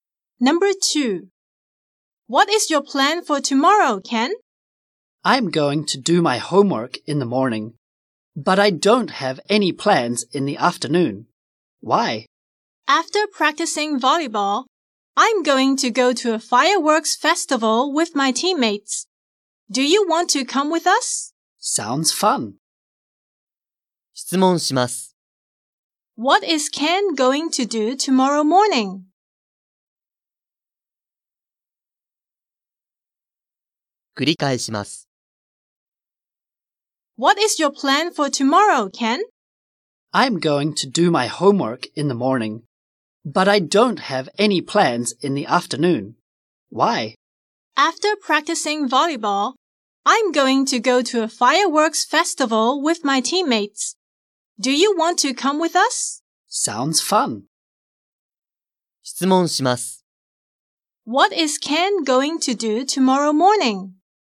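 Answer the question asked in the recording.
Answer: Do his homework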